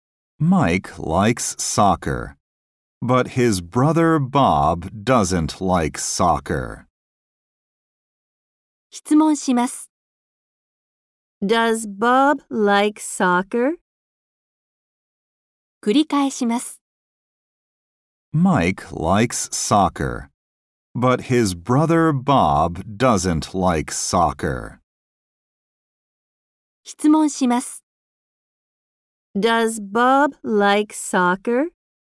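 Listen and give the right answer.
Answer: No, he doesn't.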